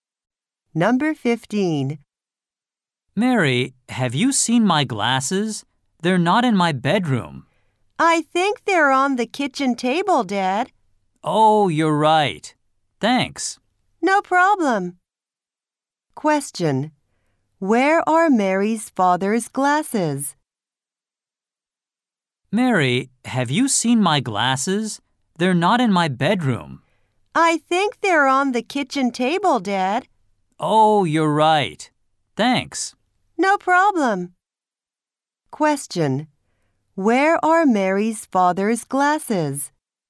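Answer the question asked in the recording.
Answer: On the kitchen table.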